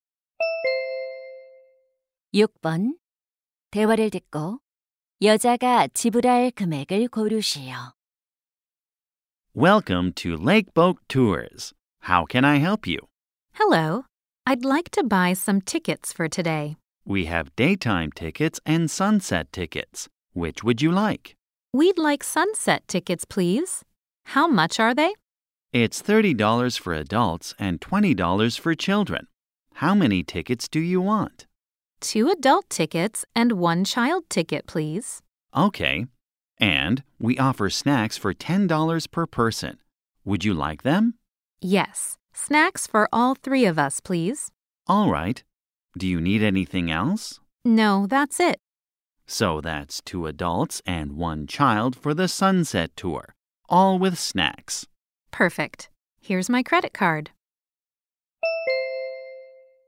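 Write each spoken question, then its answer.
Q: 대화를 듣고 여자가 지불할 금액을 고르시오.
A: 110달러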